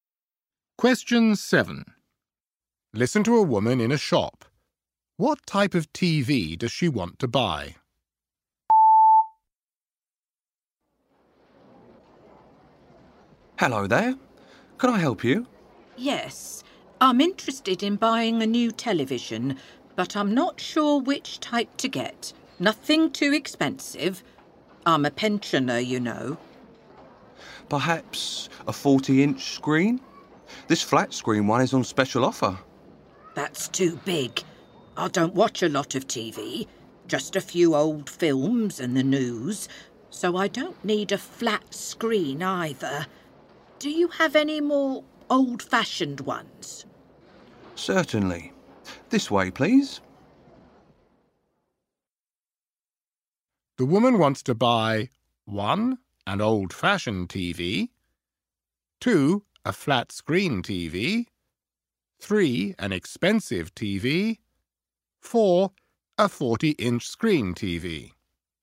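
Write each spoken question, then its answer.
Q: What type of TV does she want to buy?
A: 1: An old-fashioned TV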